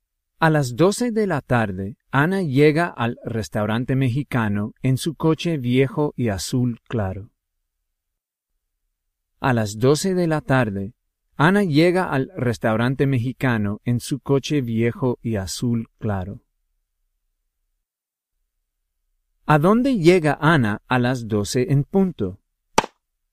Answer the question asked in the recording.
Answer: Ana llega al restaurante mexicano a las 12 en punto.